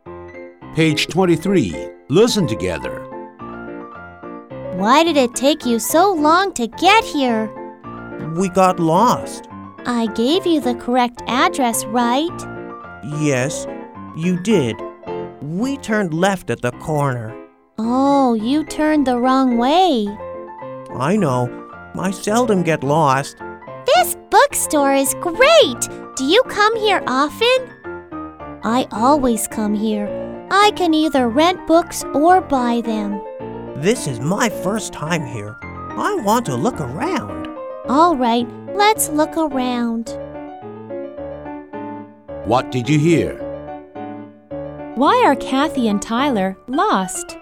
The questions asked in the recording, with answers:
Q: Why are Kathy and Tyler lost?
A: Because they turned the wrong way.